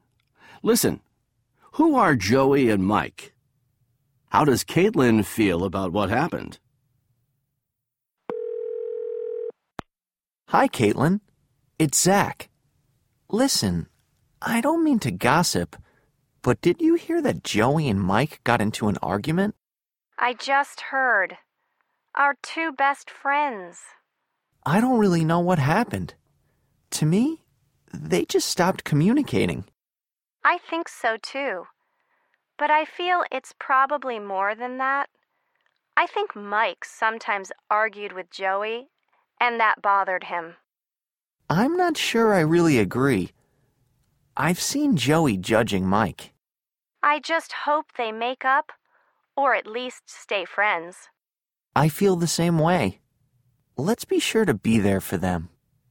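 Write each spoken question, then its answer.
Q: Who are Joey and Mike?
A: Zach and Caitlin's two best friends

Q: How does Caitlin feel about what happened?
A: She hopes they make up, or at least stay friends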